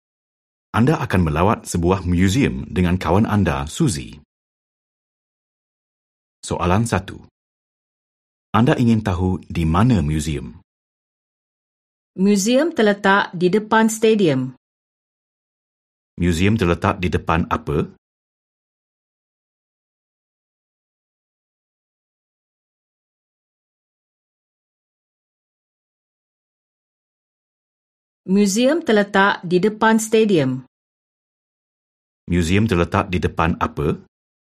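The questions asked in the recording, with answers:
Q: Museum terletak di depan apa?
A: Stadium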